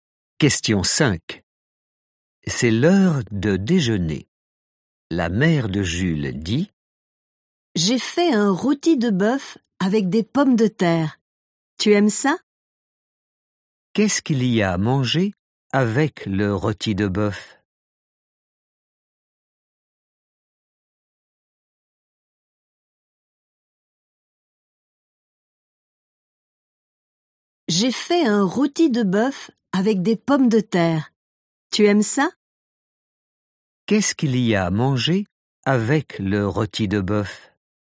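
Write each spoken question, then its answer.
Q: Qu'est-ce qu'il y a à manger avec le rôti de bœuf?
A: des pommes de terre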